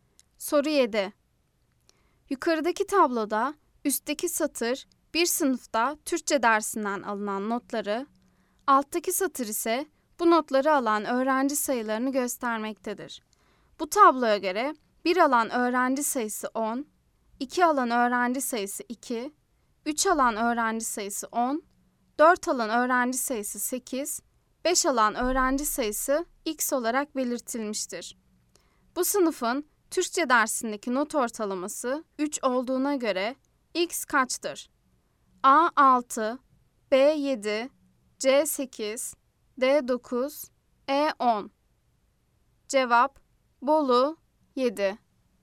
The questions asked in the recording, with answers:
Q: Bu sınıfın Türkçe dersindeki not ortalaması 3 olduğuna göre x kaçtır?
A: Cevap: Bolu 7.